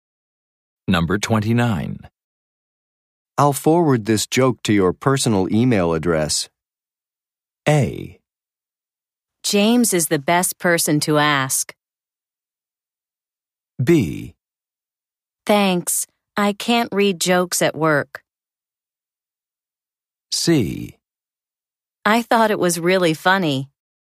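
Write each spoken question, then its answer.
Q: I'll forward this joke to your personal email address.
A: B: Thanks, I can't read jokes at work.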